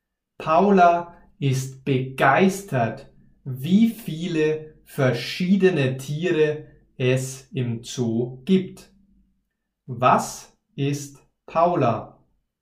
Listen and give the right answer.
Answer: Sie ist begeistert. Paula ist begeistert.